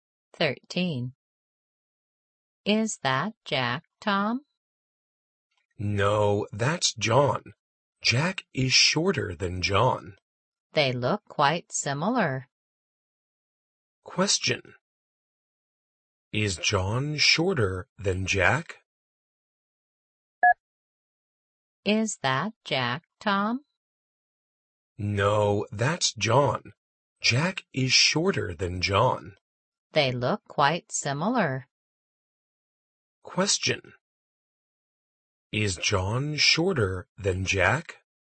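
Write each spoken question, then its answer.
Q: Is John shorter than Jack?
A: No, Jack is shorter than John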